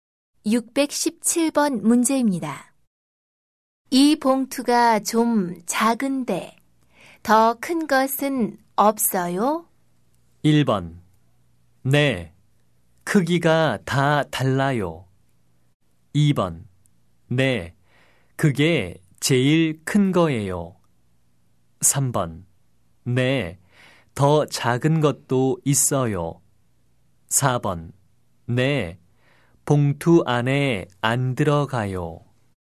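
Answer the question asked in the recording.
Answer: 2: 네, 그게 제일 큰 거예요.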